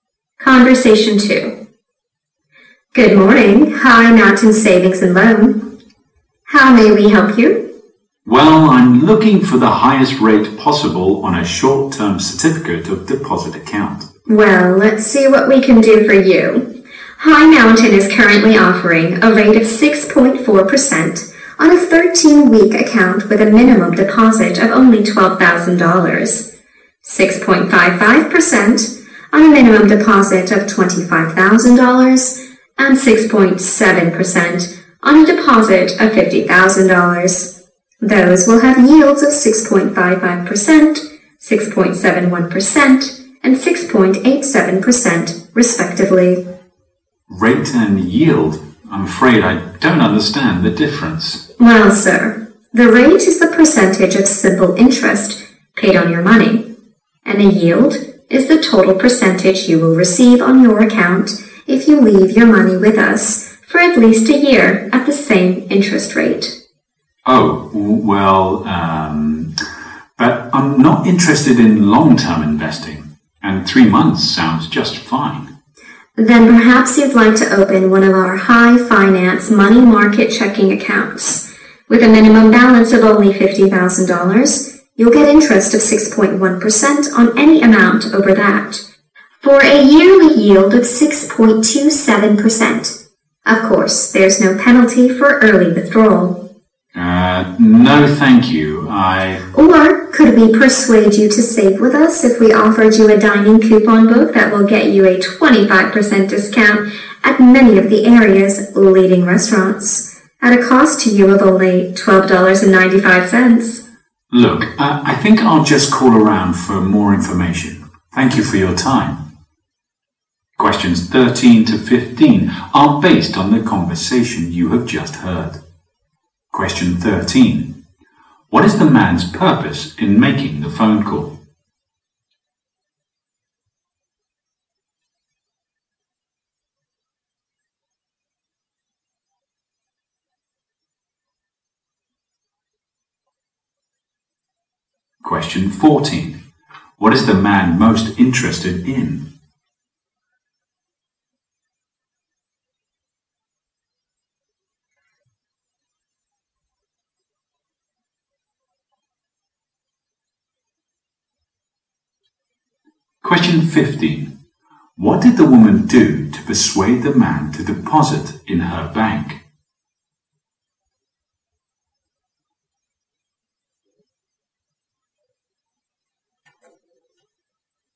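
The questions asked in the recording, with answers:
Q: What is the man's purpose in making the phone call?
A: To find the highest rate on a short-term certificate of deposit

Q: What is the man most interested in?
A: A short-term (3-month) deposit with a high rate

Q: What did the woman do to persuade the man to deposit in her bank?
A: She offered him a restaurant coupon book with 25% off.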